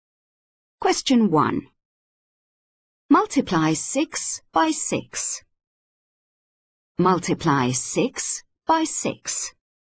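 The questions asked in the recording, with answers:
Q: Multiply 6 by 6.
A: 36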